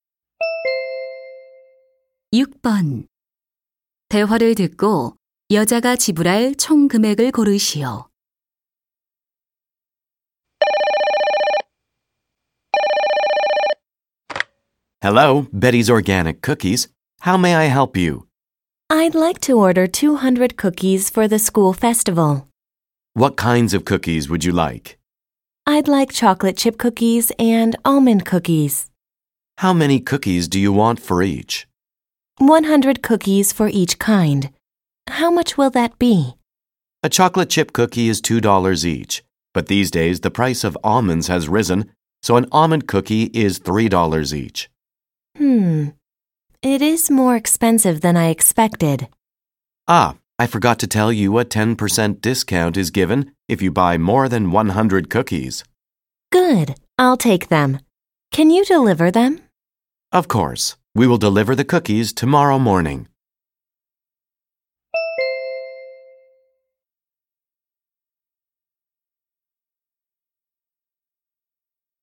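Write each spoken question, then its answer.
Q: 대화를 듣고 여자가 지불할 총 금액을 고르시오.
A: $450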